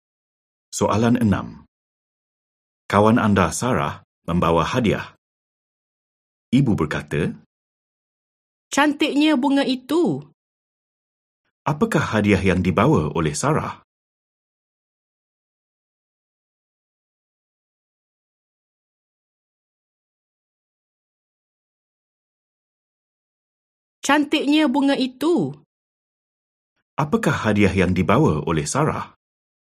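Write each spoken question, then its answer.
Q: Apakah hadiah yang dibawa oleh Sarah?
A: Bunga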